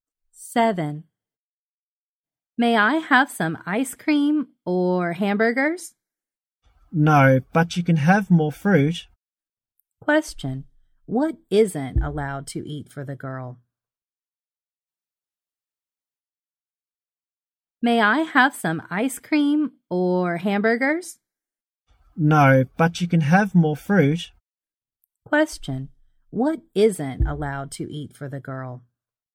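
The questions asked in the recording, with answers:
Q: Question, what isn't allowed to eat for the girl?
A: Ice cream or hamburgers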